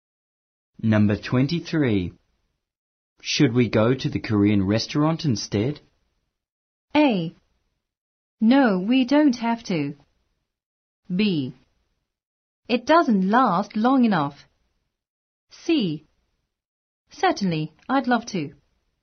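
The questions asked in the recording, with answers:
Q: Should we go to the Korean restaurant instead?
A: C: Certainly, I'd love to.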